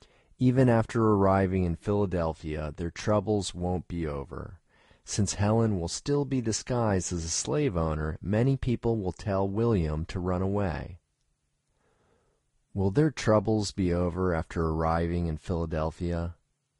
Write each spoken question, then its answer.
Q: Will their troubles be over after arriving in Philadelphia?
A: No, their troubles won't be over after arriving in Philadelphia.